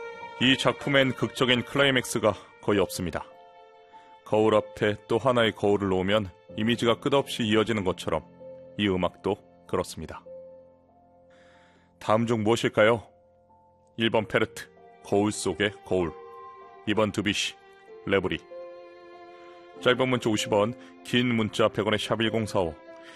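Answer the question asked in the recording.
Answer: 1: 페르트, 거울 속의 거울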